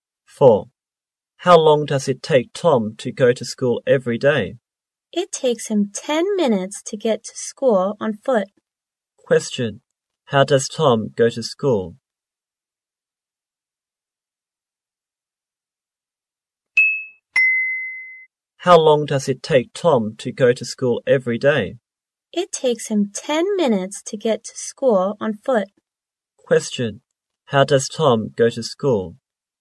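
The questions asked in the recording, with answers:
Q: Question. How does Tom go to school?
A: On foot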